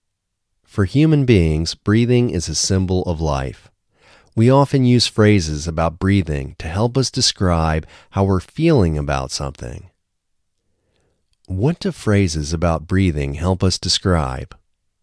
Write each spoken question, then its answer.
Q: What do phrases about breathing help us describe?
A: Phrases about breathing help us describe how we're feeling about something.